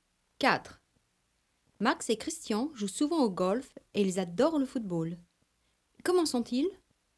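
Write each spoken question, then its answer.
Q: Comment sont-ils?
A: sportifs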